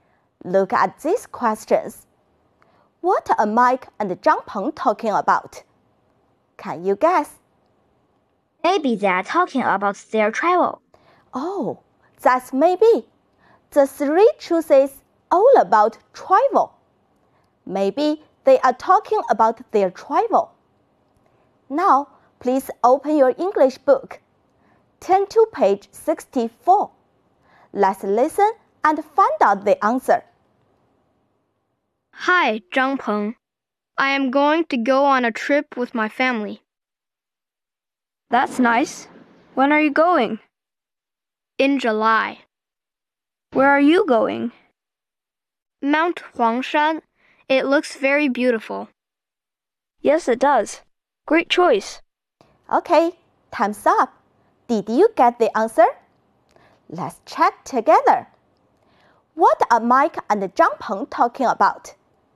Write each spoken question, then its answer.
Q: What are Mike and Zhang Peng talking about?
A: Family trip.